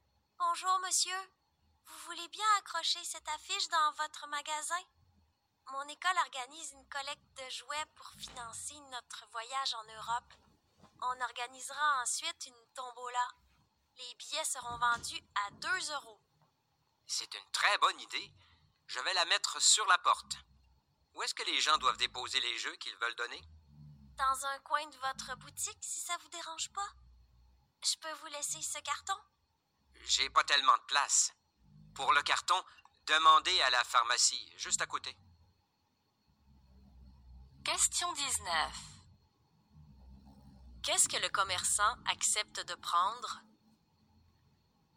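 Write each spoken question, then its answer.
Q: Qu'est-ce que le commerçant accepte de prendre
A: l'affiche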